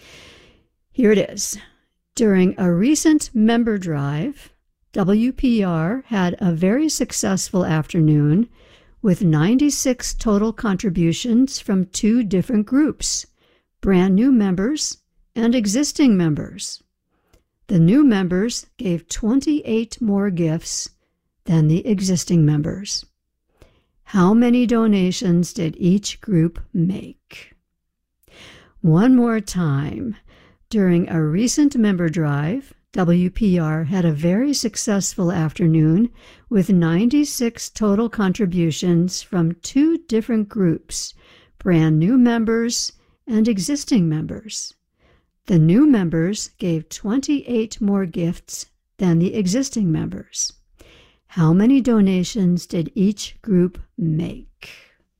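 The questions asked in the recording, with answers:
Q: How many donations did each group make?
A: New members 62, existing members 34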